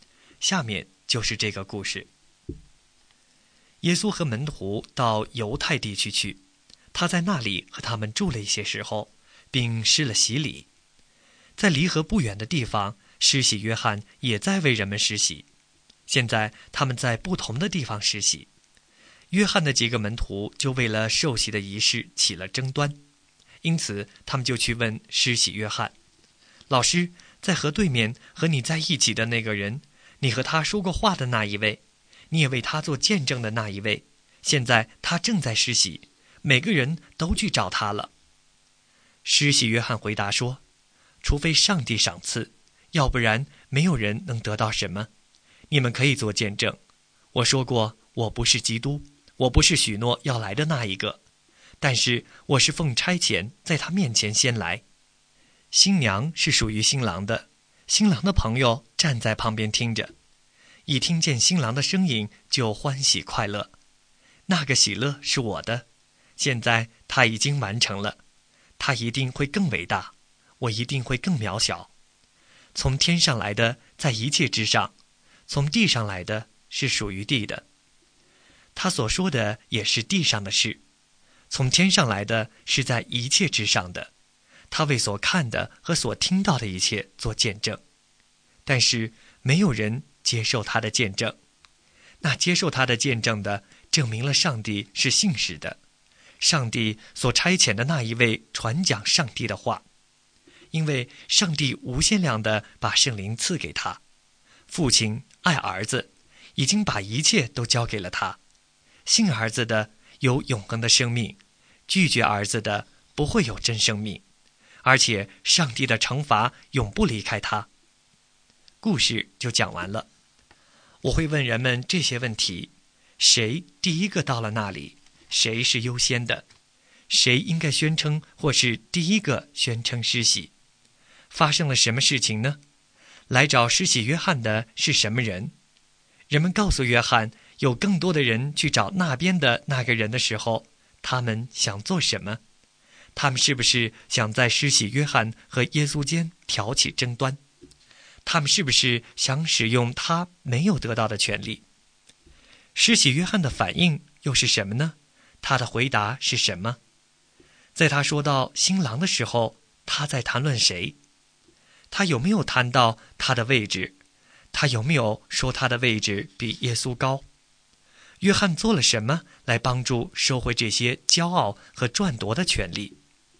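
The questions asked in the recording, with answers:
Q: 来找施洗约翰的是什么人?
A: 约翰的几个门徒

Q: 在他说到新郎的时候,他在谈论谁?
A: 耶稣

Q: 他有没有说他的位置比耶稣高?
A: 没有,他说耶稣一定会更伟大,他一定会更渺小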